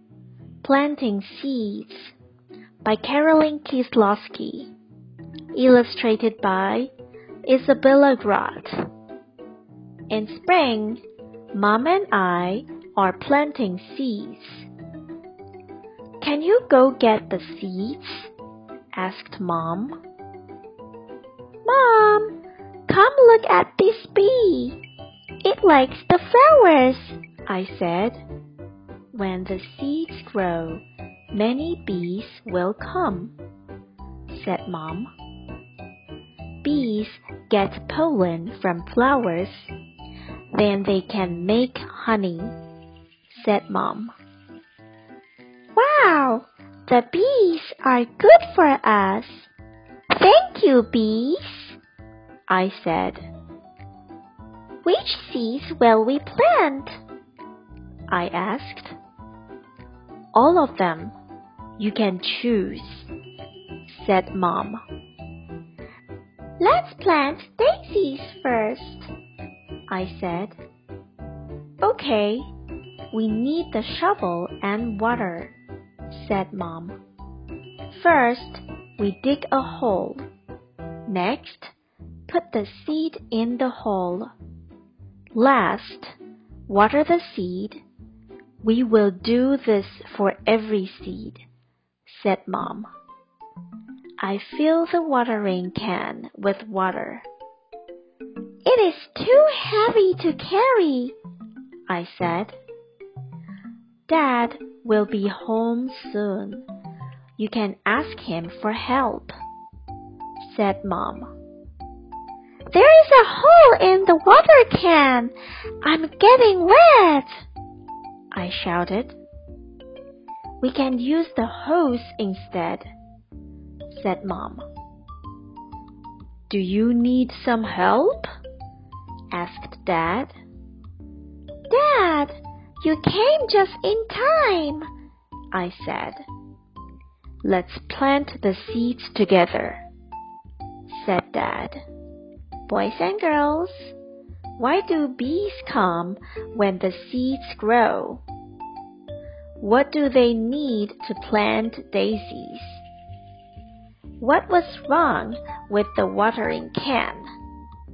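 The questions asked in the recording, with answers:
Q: Boys and girls, why do bees come when the seeds grow?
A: To get pollen from the flowers

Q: What do they need to plant daisies?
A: The shovel and water

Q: What was wrong with the watering can?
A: There was a hole in it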